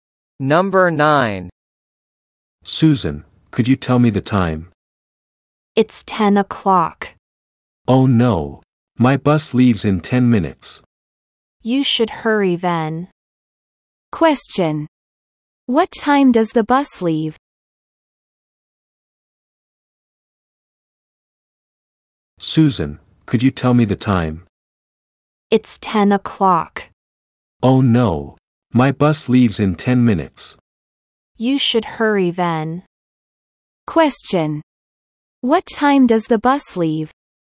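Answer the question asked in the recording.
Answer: At 10:10.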